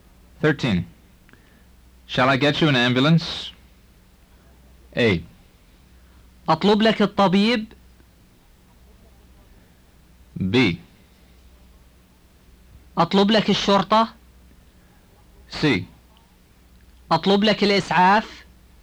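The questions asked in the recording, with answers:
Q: Shall I get you an ambulance?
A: C: أطلب لك الإسعاف.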